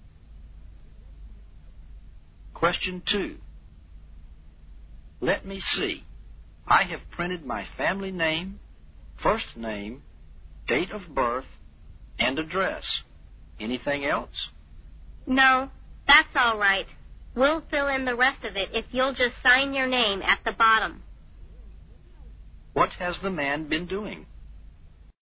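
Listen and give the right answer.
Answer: Filling out a form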